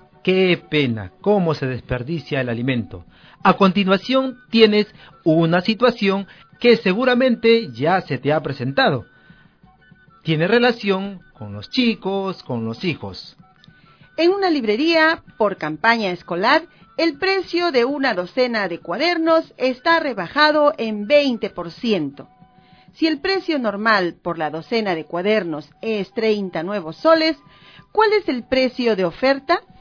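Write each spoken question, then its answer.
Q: Si el precio normal por la docena de cuadernos es 30 nuevos soles, ¿cuál es el precio de oferta?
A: 24 nuevos soles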